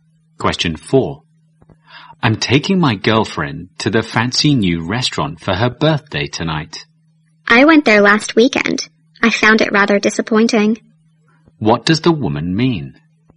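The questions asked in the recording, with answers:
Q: What does the woman mean?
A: The new restaurant is disappointing.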